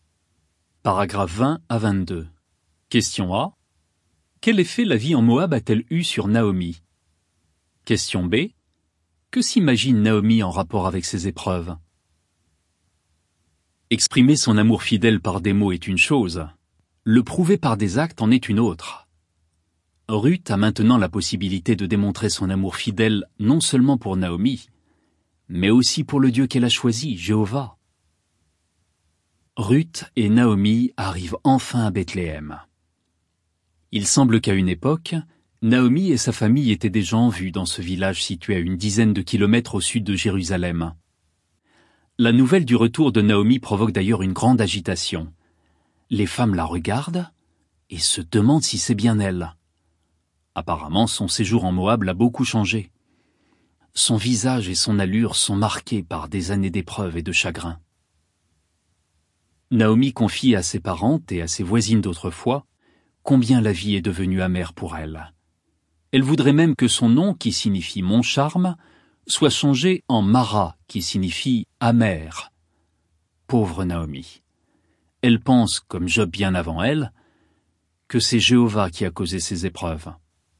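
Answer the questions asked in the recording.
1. Elle l'a beaucoup changée : marquée par les épreuves et le chagrin, la vie est devenue amère
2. Que c'est Jéhovah qui a causé ses épreuves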